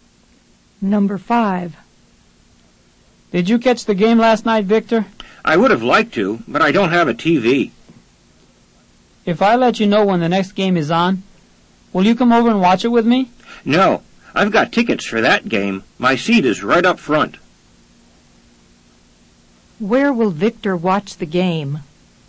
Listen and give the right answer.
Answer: Number 5 is C. Repeat. Victor will watch the game at the stadium.